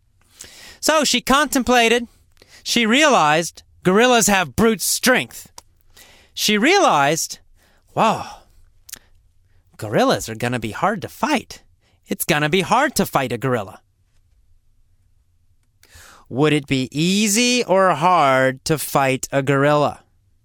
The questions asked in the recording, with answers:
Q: Would it be easy or hard to fight a gorilla?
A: It would be hard for Tomoe to fight a gorilla.